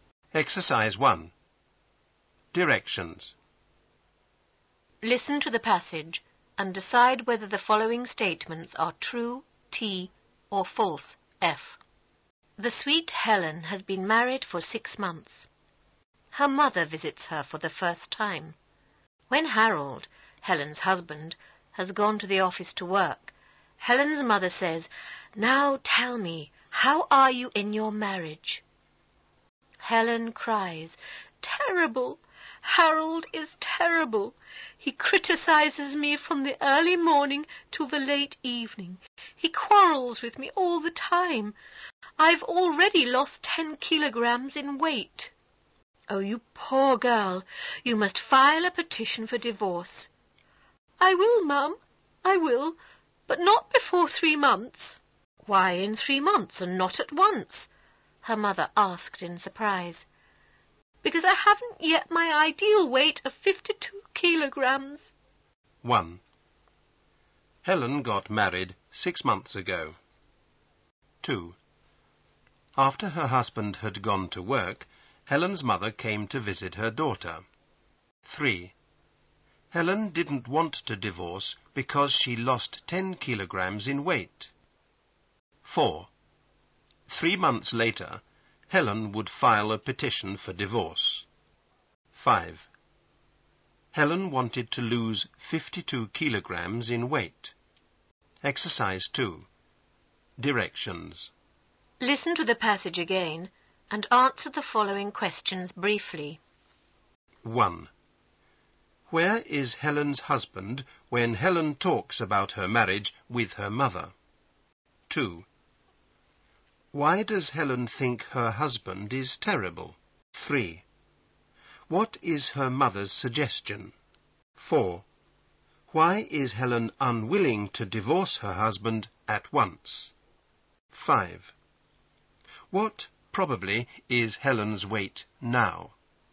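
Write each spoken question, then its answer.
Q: Where is Helen's husband when Helen talks about her marriage with her mother?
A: At the office, working

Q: Why does Helen think her husband is terrible?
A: He criticizes her all day and quarrels with her all the time

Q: What is her mother's suggestion?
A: To file a petition for divorce

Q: Why is Helen unwilling to divorce her husband at once?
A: She hasn't reached her ideal weight of 52 kilograms yet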